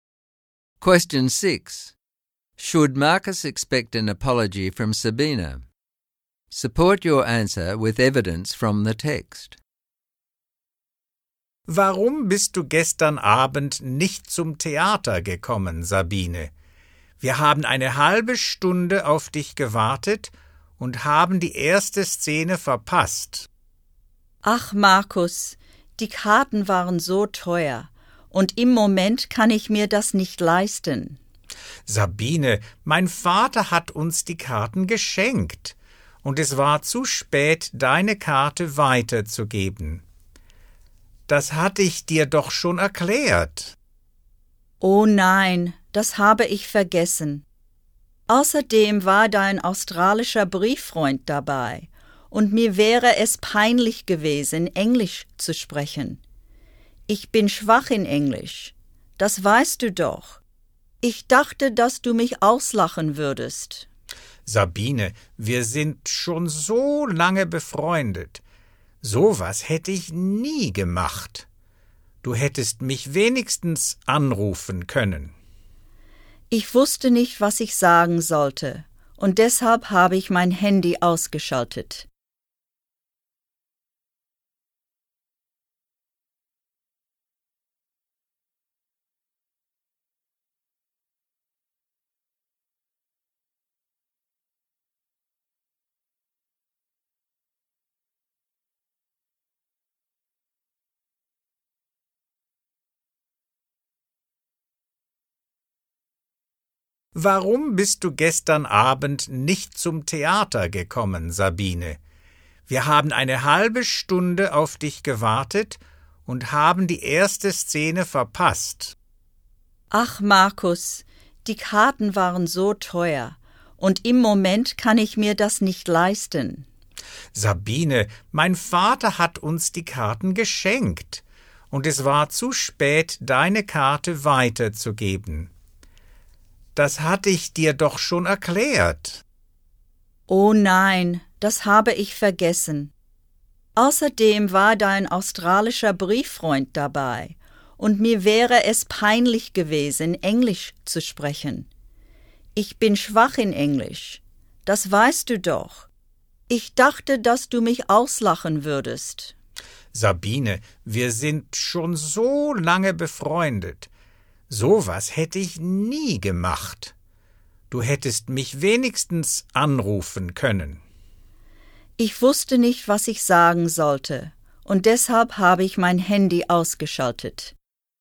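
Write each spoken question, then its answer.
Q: Should Marcus expect an apology from Sabina?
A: Yes. She didn't come and they waited half an hour and missed the first scene. Her excuse about expensive tickets was wrong because they were a gift, and she had forgotten. She was afraid he would laugh at her English, and she switched off her phone instead of calling.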